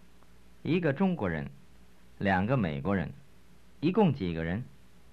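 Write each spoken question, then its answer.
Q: 一共几个人?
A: 3个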